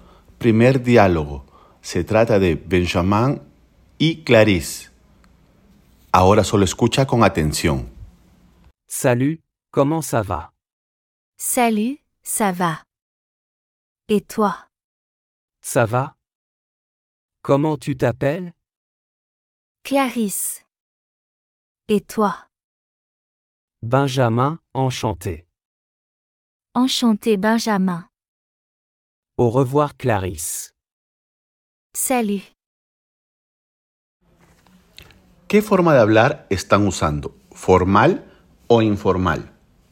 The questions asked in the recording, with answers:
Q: ¿Qué forma de hablar están usando?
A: están usando el lenguaje informal